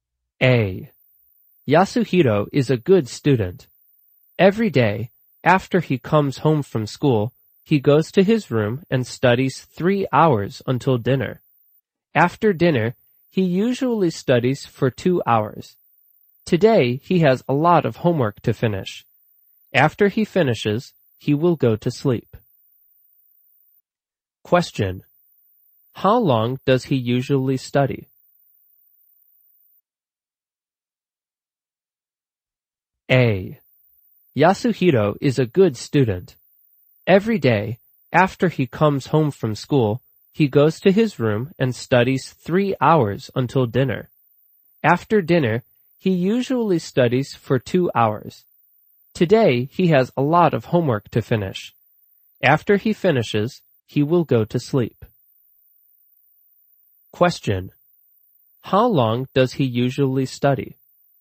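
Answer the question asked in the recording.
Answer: 5 hours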